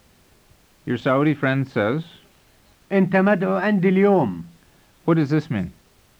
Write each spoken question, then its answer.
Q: What does this mean?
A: It means, you're invited to my house today.